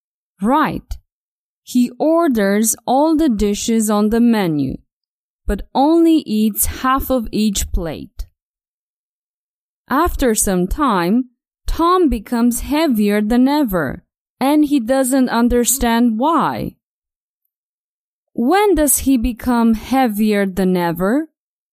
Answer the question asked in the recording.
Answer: After some time, Tom becomes heavier than ever after some time.